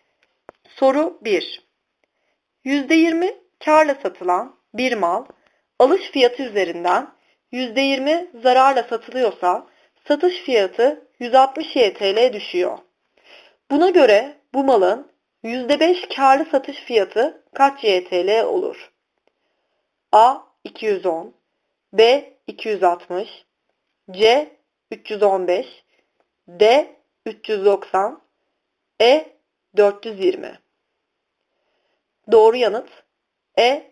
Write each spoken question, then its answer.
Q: Buna göre bu malın %5 karlı satış fiyatı kaç JTL olur?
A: Doğru yanıt E.